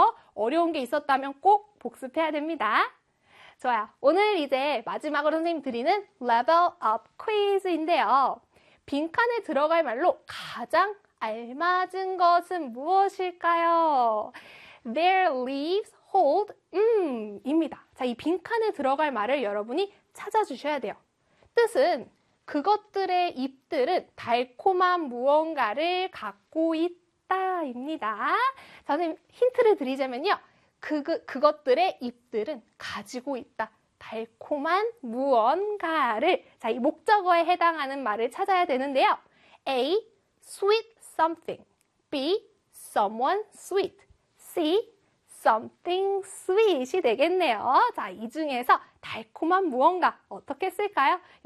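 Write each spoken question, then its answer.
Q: 빈칸에 들어갈 말로 가장 알맞은 것은 무엇일까요?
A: C: something sweet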